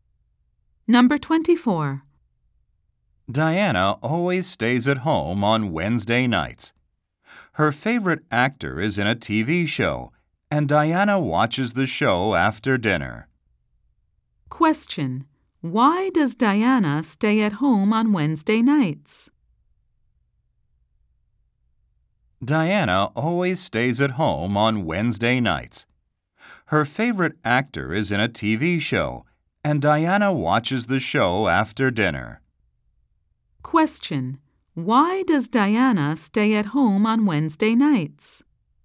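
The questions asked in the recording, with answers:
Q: Why does Diana stay at home on Wednesday nights?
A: To watch a TV show with her favorite actor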